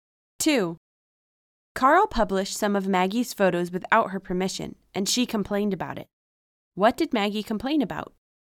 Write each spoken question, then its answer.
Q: What did Maggie complain about?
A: Maggie complained about Carl's publishing some of her photos without her permission.